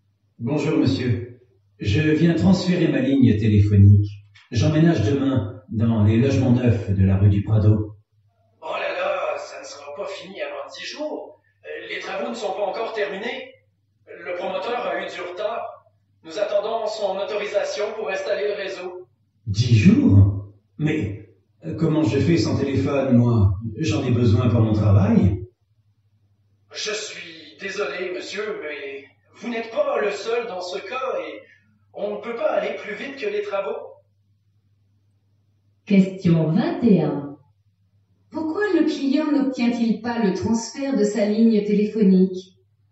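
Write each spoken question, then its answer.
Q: Pourquoi le client n'obtient-il pas le transfert de sa ligne téléphonique?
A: Parce que les travaux des logements neufs ne sont pas terminés (le promoteur a du retard et le réseau n'est pas encore installé).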